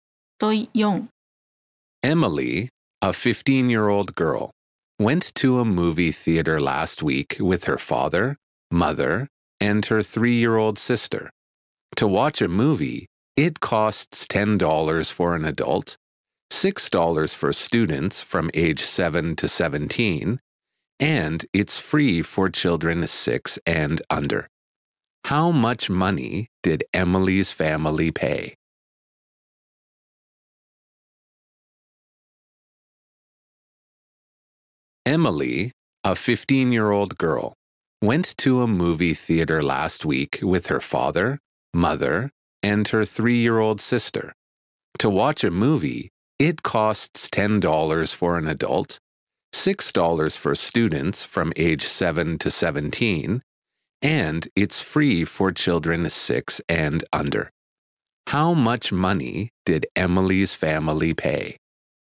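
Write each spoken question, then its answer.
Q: How much money did Emily's family pay?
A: $26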